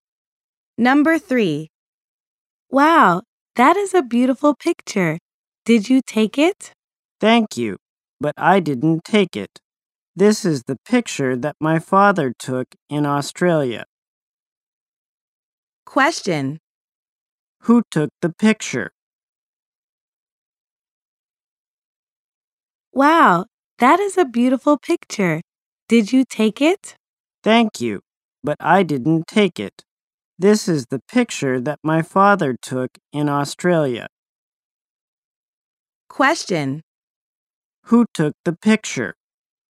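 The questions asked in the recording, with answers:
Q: Who took the picture?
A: Her father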